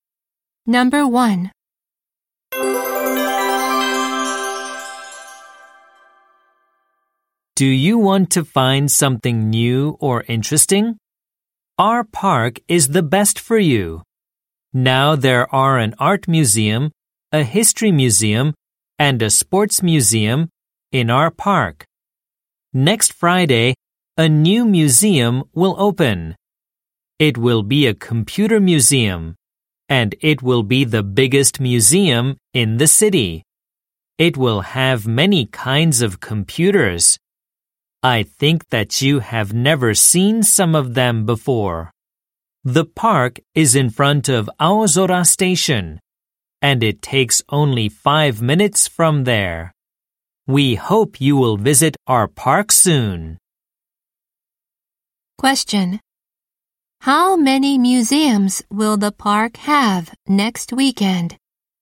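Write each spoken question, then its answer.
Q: How many museums will the park have next weekend?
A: Four.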